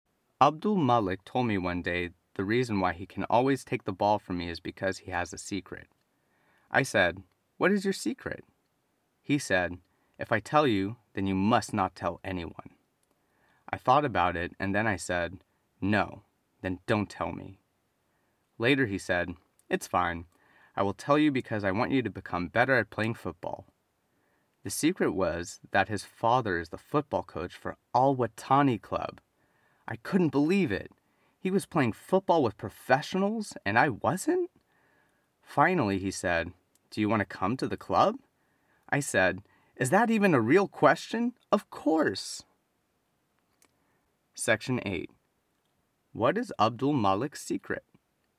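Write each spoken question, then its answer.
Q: What is Abdul Malik's secret?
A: His father is the football coach for Al Watani Club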